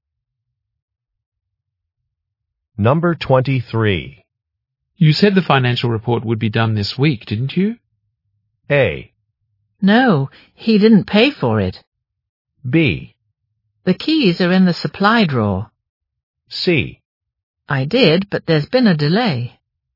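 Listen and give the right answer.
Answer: C: I did, but there's been a delay.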